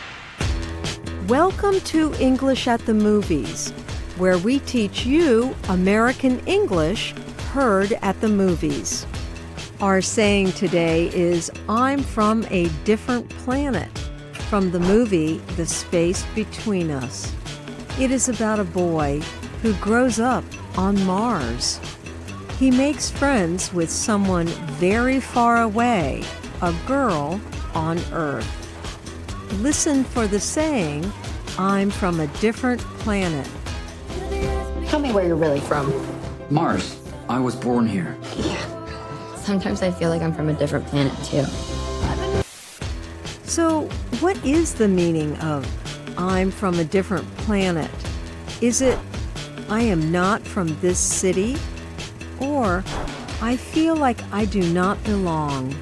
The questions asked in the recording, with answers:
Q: So, what is the meaning of I'm from a different planet?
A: I'm from a different planet means you feel like you do not belong.